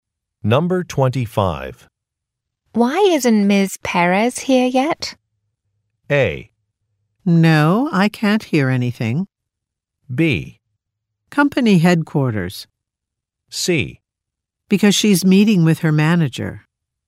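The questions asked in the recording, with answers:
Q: Why isn't Ms. Perez here yet?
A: C: Because she's meeting with her manager.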